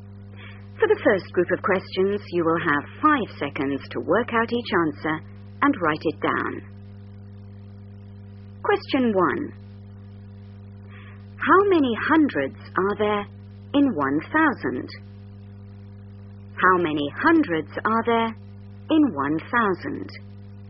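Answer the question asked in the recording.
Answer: 10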